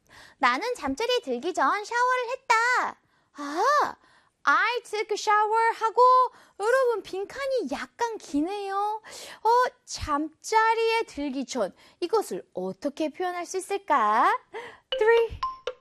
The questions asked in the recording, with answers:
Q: 잠자리에 들기 전 이것을 어떻게 표현할 수 있을까?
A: 정답은 before bed.